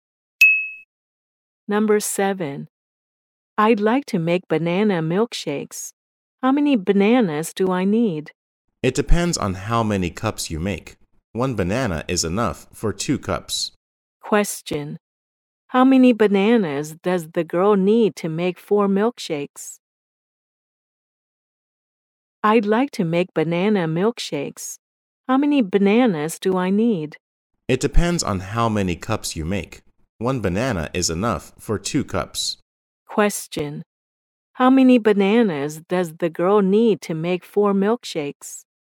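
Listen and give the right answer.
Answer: Two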